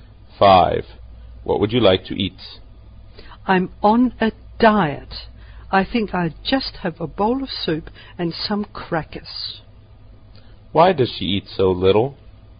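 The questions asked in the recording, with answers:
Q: Why does she eat so little?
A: She is on a diet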